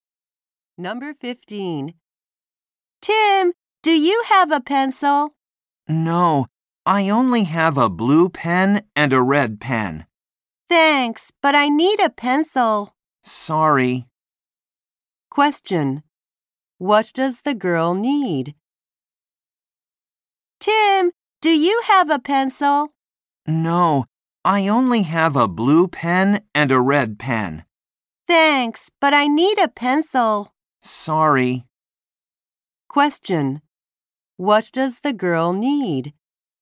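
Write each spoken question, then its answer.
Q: What does the girl need?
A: A pencil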